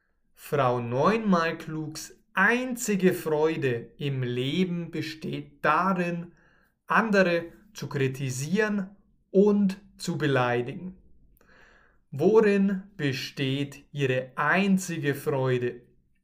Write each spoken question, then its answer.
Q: Worin besteht ihre einzige Freude?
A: Darin, andere zu kritisieren und und zu beleidigen.